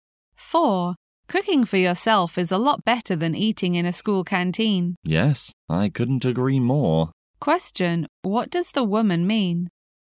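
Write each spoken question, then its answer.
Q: what does the woman mean?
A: She agrees that cooking for yourself is better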